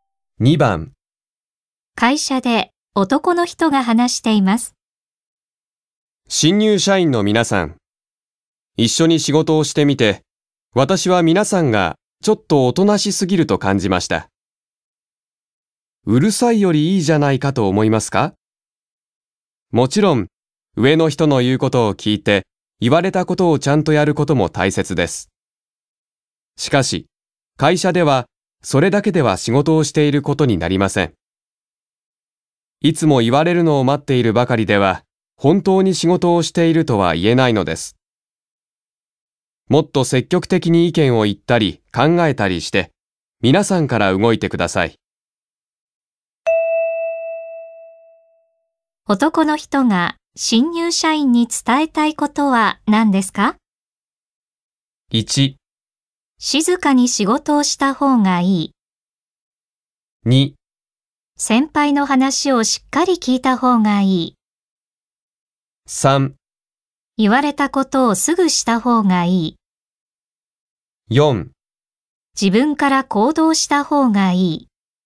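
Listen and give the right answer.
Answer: 4: 自分から行動した方がいい。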